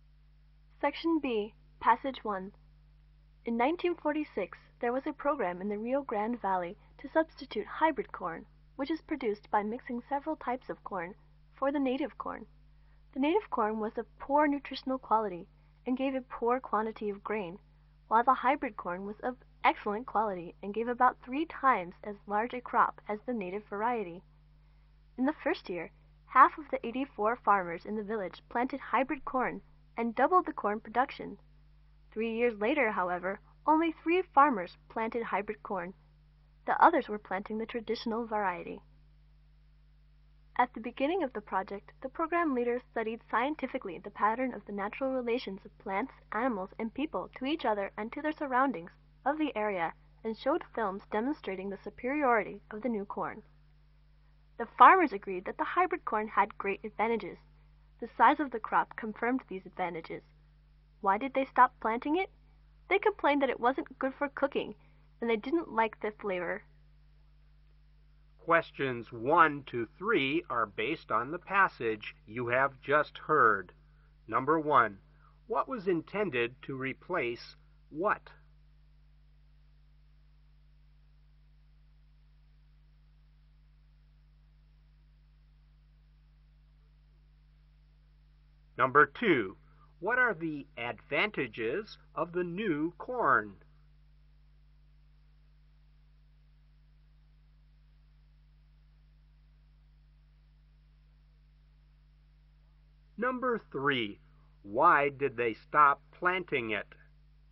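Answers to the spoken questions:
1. Hybrid corn was to replace the native corn.
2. Excellent nutritional quality and about three times as large a crop.
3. It wasn't good for cooking and they didn't like the flavor.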